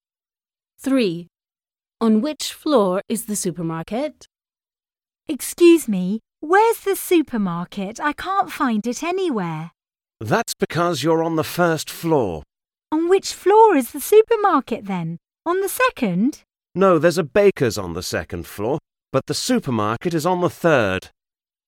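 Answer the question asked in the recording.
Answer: the third floor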